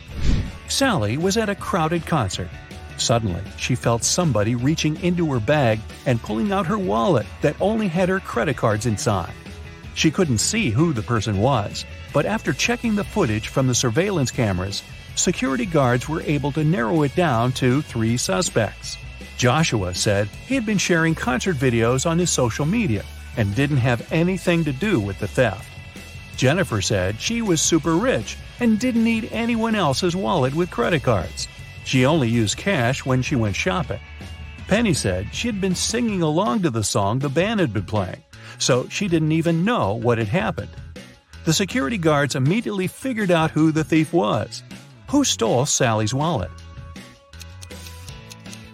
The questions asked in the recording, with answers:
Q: Who stole Sally's wallet?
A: Nobody told Jennifer that the wallet contained only credit cards, but somehow she still knew it.